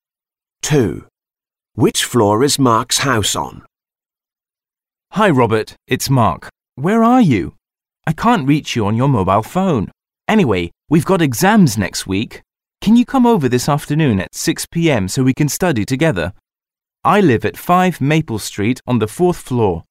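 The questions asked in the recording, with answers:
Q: Which floor is Mark's house on?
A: The 4th floor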